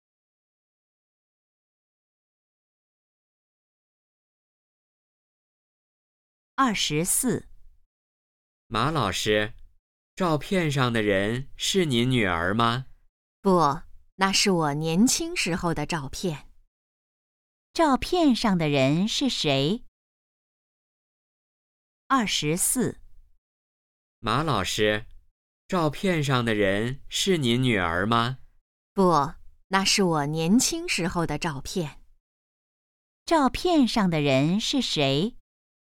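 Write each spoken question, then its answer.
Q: 照片上的人是谁?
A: 马老师自己(年轻时)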